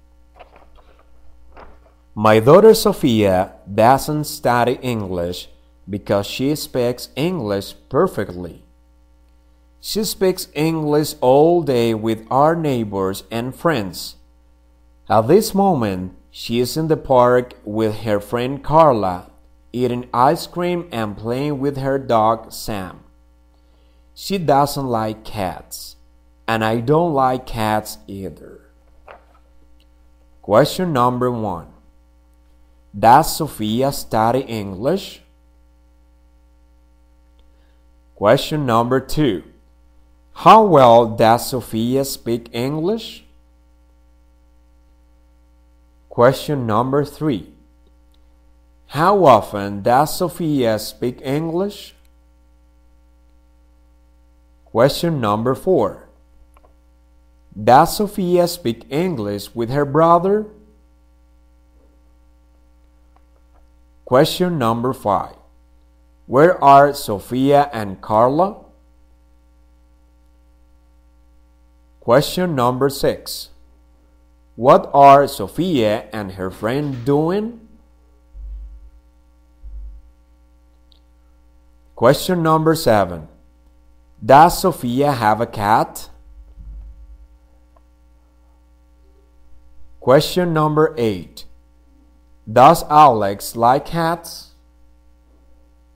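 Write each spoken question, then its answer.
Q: Does Sofia study English?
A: No

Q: How well does Sofia speak English?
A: Perfectly

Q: How often does Sofia speak English?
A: All day

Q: Where are Sofia and Carla?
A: In the park

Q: What are Sofia and her friend doing?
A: Eating ice cream and playing with her dog Sam

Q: Does Sofia have a cat?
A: No, she has a dog

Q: Does Alex like cats?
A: No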